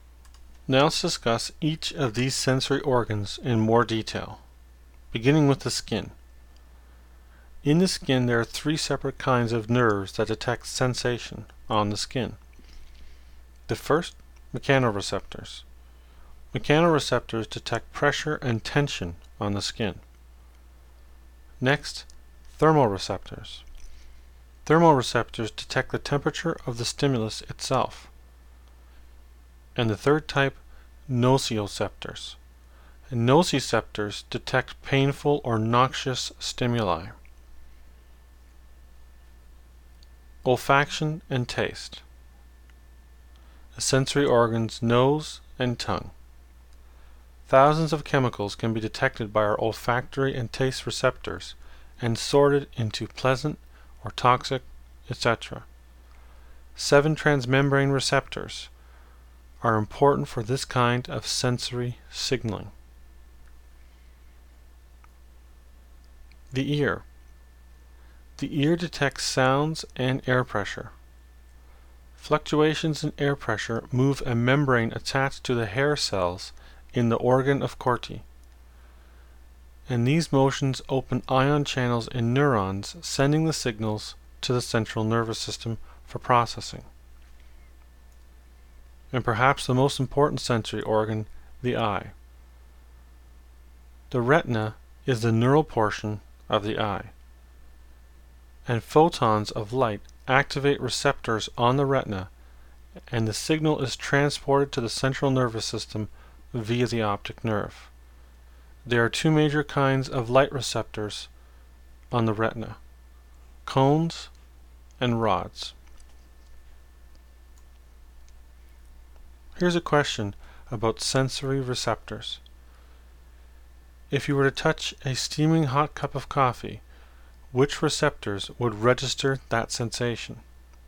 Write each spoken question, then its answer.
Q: If you were to touch a steaming hot cup of coffee, which receptors would register that sensation?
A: thermoreceptors and possibly nociceptors, or noxious receptors.